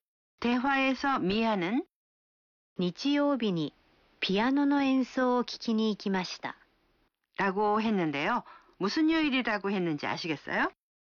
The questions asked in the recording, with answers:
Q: 무슨 요일이라고 했는지 아시겠어요?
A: 일요일이요.